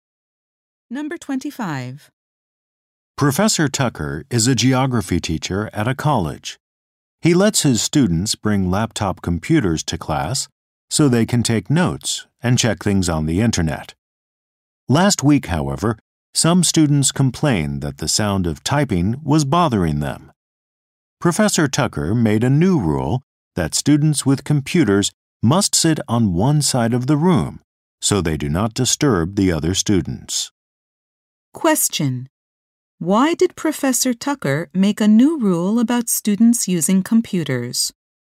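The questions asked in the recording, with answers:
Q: Why did Professor Tucker make a new rule about students using computers?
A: Students complained typing noise bothered them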